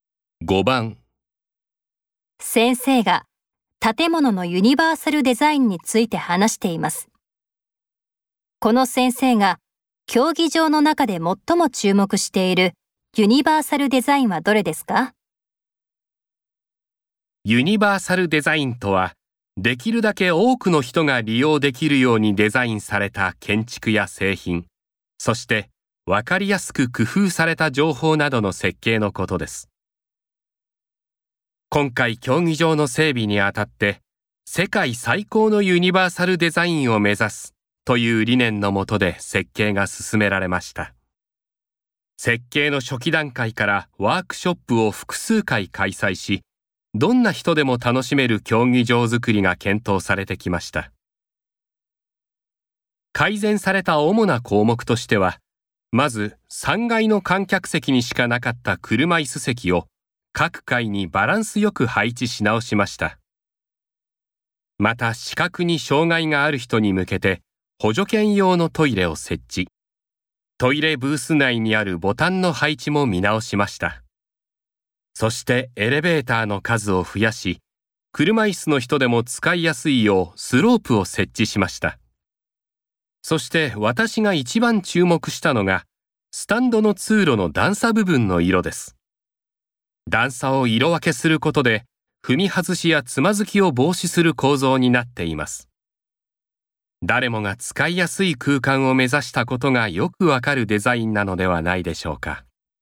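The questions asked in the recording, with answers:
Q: この先生が競技場の中で最も注目しているユニバーサルデザインはどれですか?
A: スタンドの通路の段差部分の色分け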